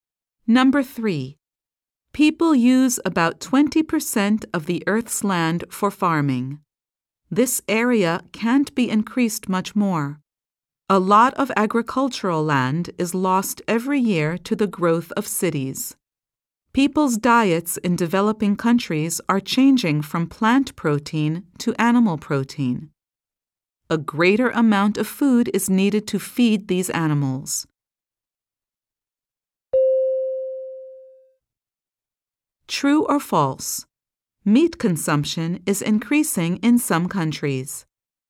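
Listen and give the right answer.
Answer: True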